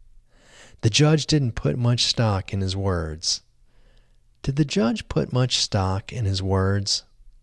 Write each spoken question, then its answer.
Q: Did the judge put much stock in his words?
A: No, the judge didn't put much stock in his words.